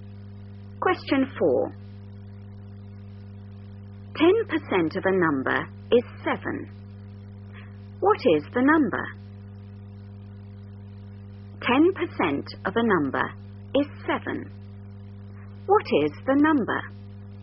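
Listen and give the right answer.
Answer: 70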